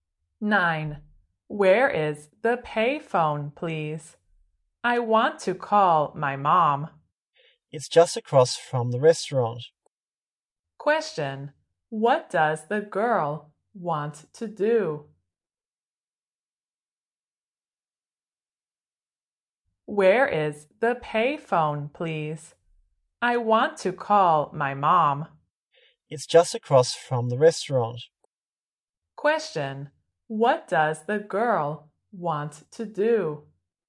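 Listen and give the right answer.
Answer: Call her mom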